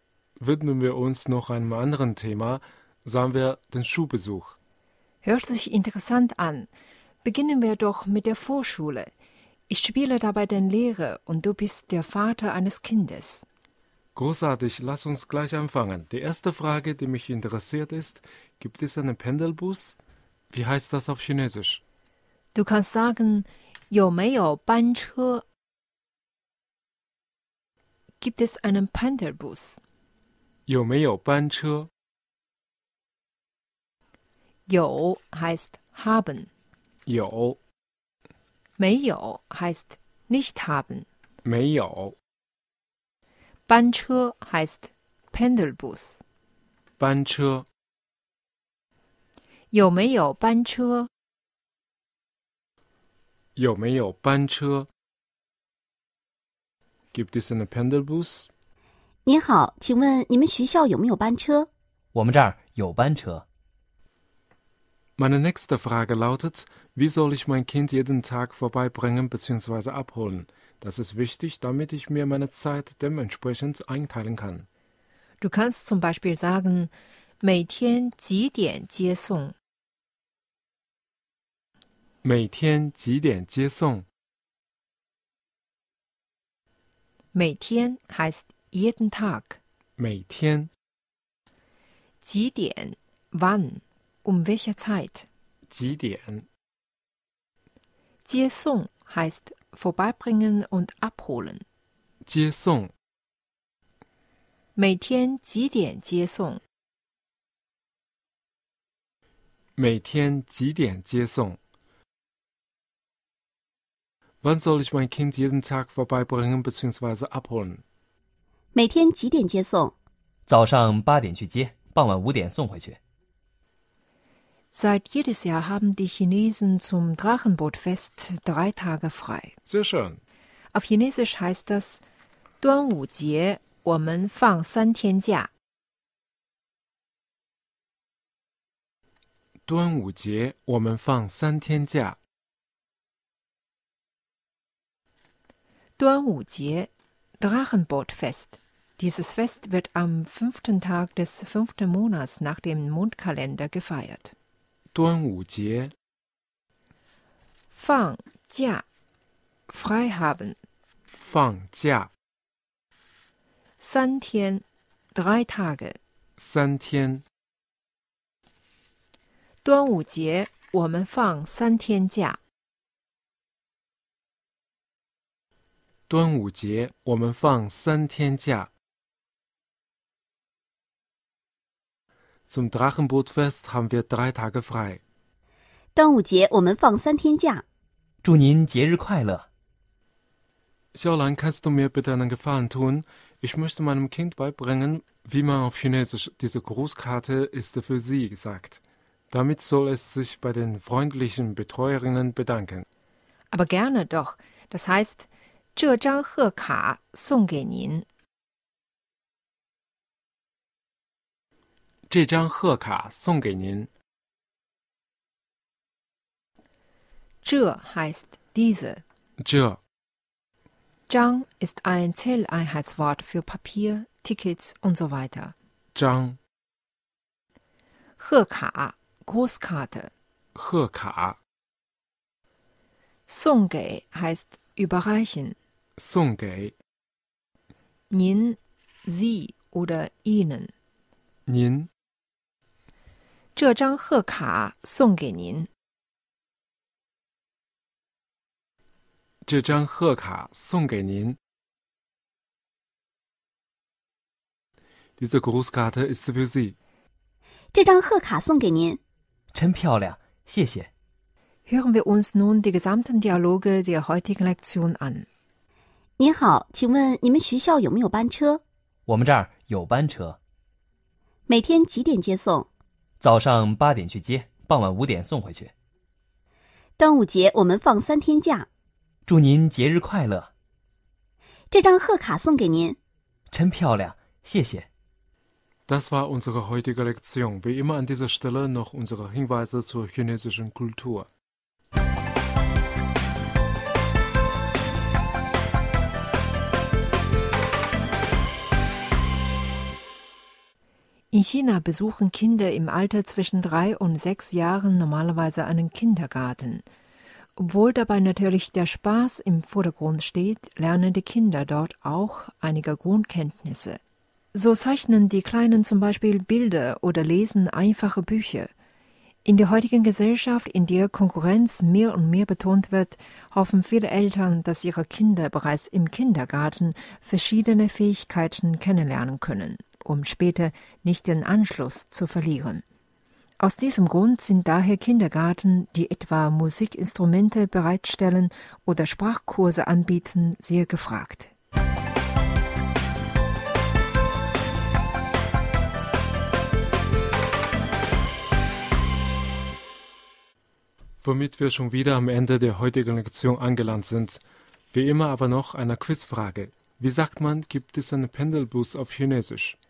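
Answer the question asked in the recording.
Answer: 有没有班车?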